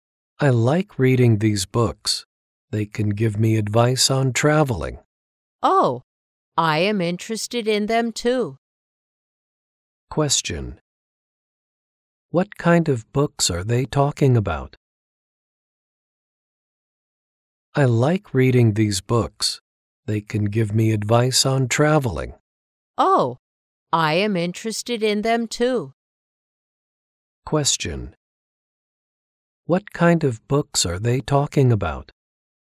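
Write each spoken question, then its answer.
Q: What kind of books are they talking about?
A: Travel books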